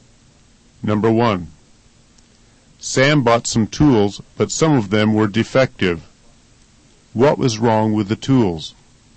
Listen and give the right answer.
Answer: Defective tools are not made correctly.